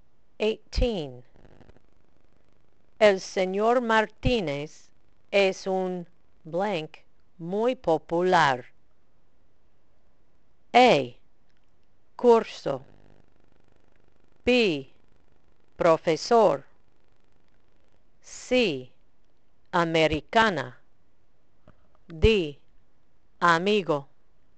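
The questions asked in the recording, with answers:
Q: El señor Martínez es un blank muy popular.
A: B: profesor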